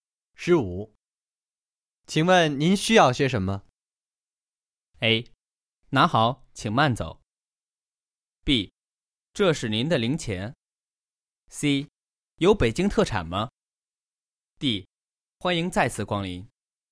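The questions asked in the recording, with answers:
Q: 请问您需要些什么?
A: C: 有北京特产吗?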